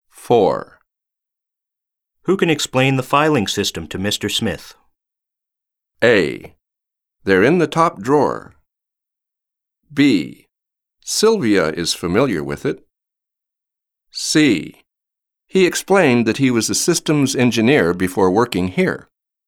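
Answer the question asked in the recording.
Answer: B: Sylvia is familiar with it.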